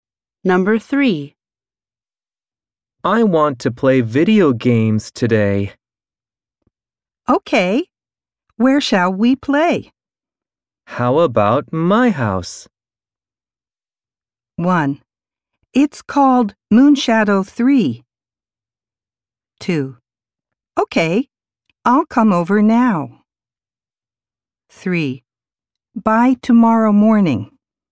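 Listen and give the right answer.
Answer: 2: Okay. I'll come over now.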